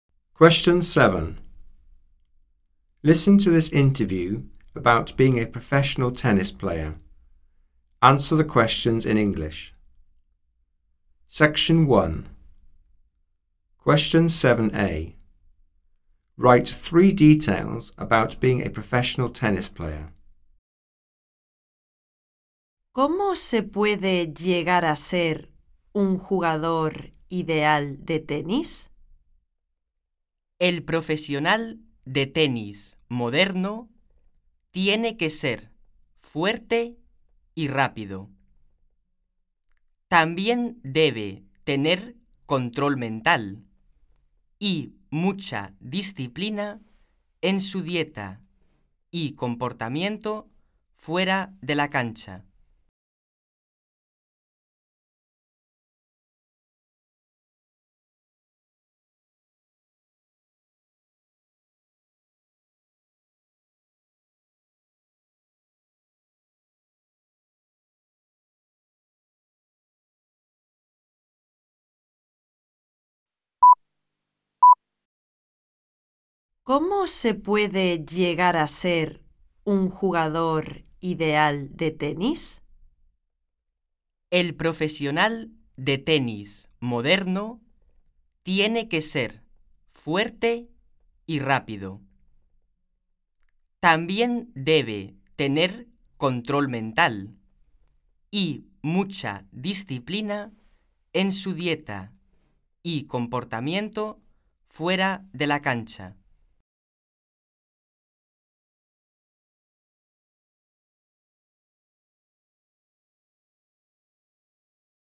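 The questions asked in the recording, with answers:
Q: Write 3 details about being a professional tennis player.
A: Strong, fast, mental control, discipline in diet and behaviour off court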